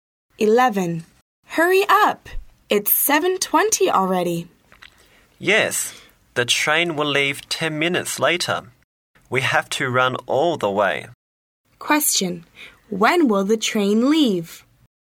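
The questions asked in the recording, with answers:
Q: When will the train leave?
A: At 7:30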